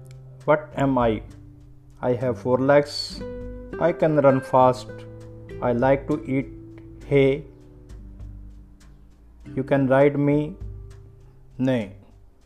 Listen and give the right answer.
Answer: I am horse.